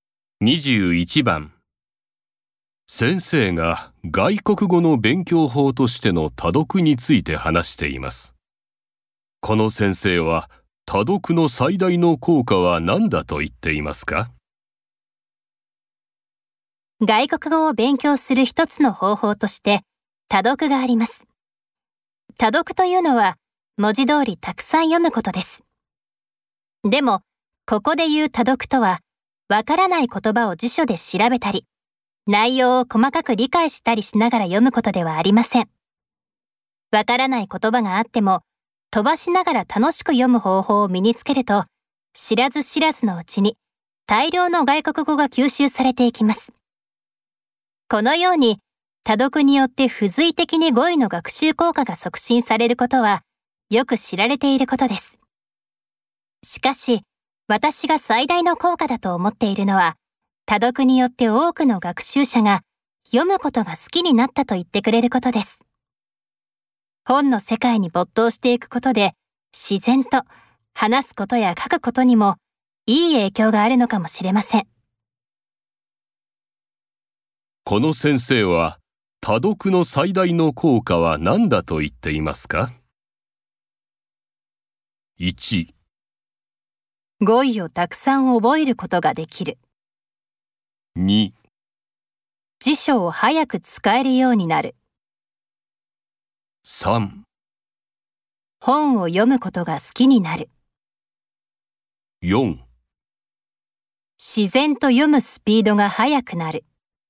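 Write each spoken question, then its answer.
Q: この先生は、多読の最大の効果は何だと言っていますか?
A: 3: 本を読むことが好きになる。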